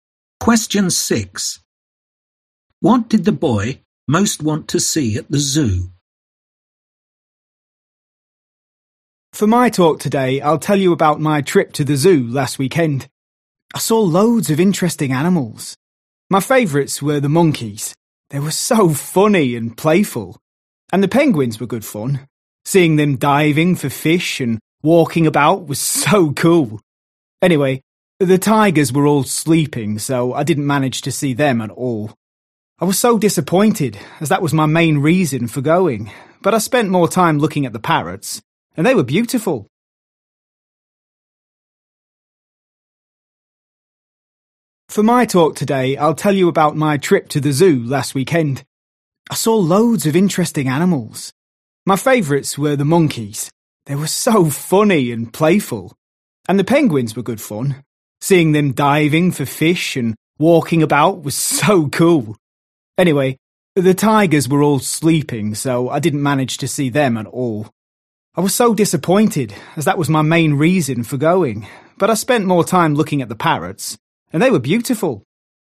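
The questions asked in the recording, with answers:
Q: What did the boy most want to see at the zoo?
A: the tigers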